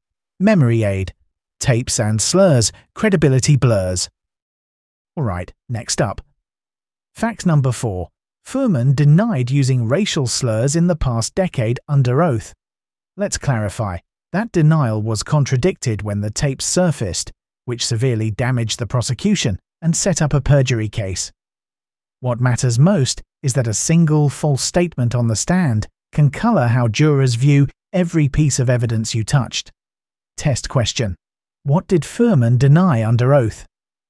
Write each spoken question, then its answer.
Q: What did Fuhrman deny under oath?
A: Correct answer. Using racial slurs.